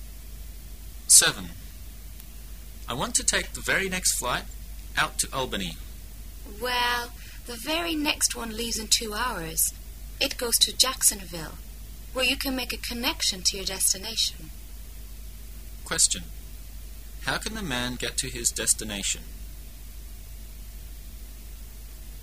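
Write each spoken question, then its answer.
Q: How can the man get to his destination?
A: Fly to Jacksonville and make a connection to Albany

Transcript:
A
[解析] M: I want to take the very next flight out to Albany. W: Well, the very next one leaves in two hours. It goes to Jacksonville, where you can make a connection to your destination. Q: How can the man get to his destination?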